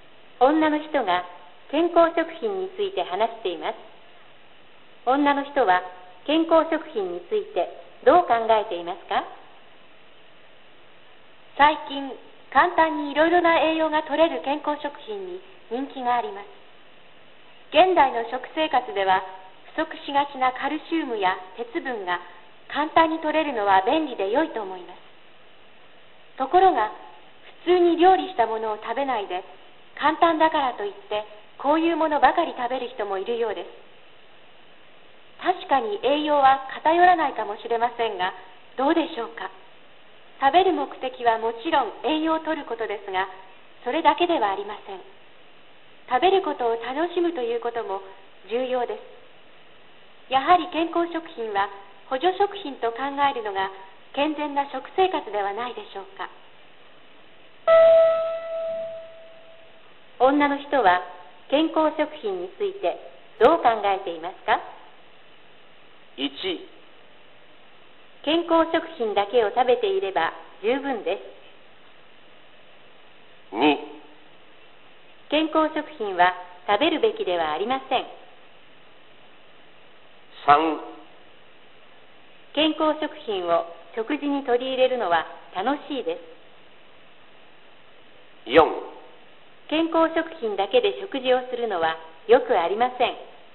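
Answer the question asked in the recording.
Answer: 4: 健康食品だけで食事をするのはよくありません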